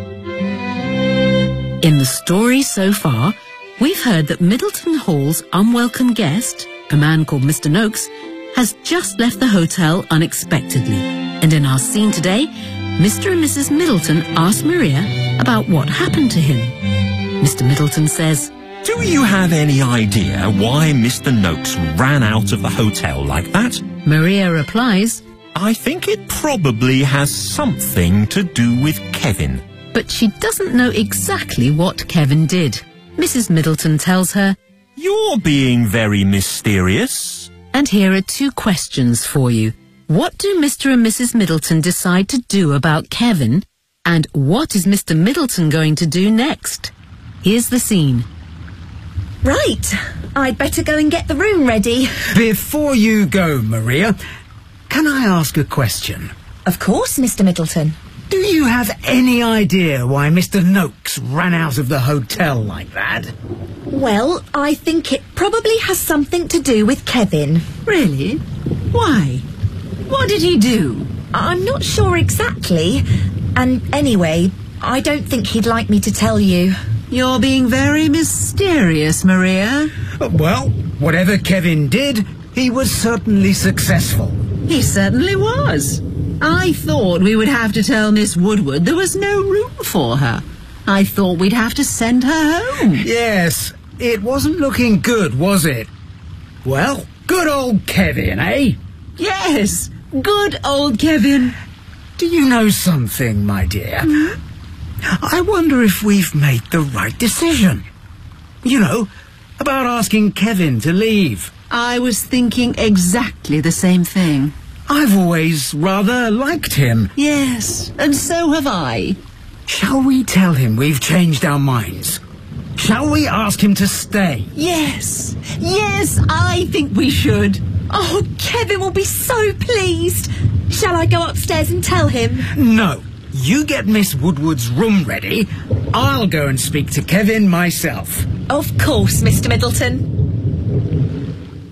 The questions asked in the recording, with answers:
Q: What do Mr. and Mrs. Middleton decide to do about Kevin?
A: Shall we ask him to stay?